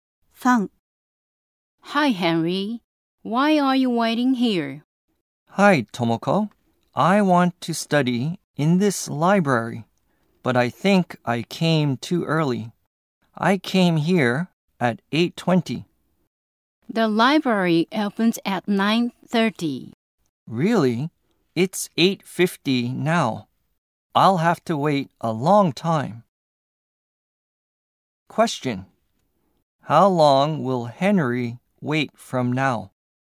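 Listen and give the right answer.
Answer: 40 minutes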